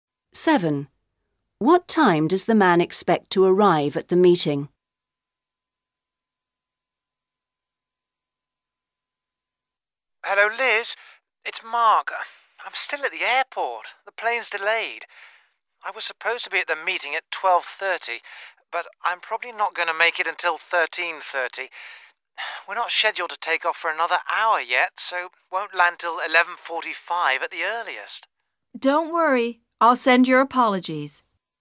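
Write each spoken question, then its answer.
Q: What time does the man expect to arrive at the meeting?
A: 13:30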